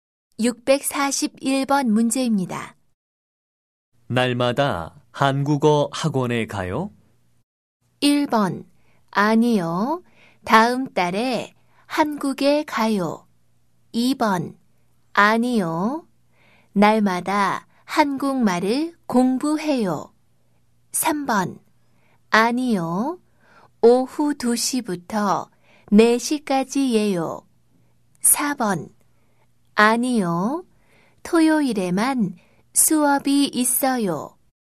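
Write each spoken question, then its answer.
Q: 날마다 한국어 학원에 가요?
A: 4: 아니요. 토요일에만 수업이 있어요.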